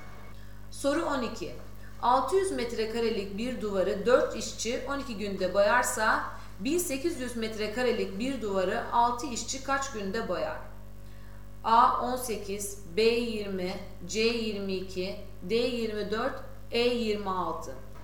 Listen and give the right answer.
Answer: Doğru cevap D 24.